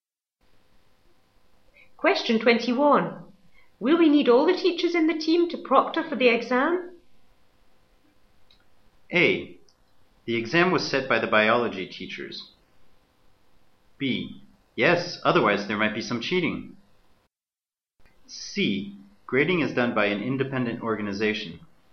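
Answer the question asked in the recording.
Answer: B: Yes, otherwise there might be some cheating.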